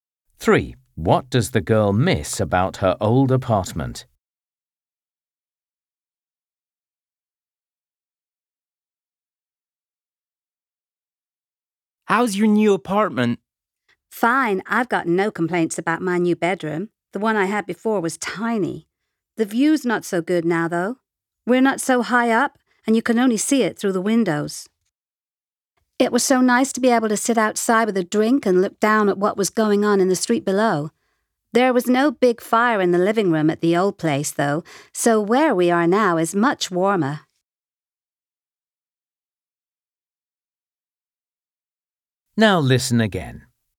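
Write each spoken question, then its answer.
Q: What does the girl miss about her old apartment?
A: The balcony with a view of the street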